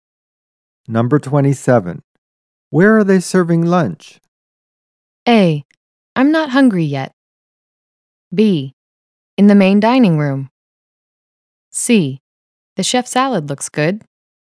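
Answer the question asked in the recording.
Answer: B: In the main dining room.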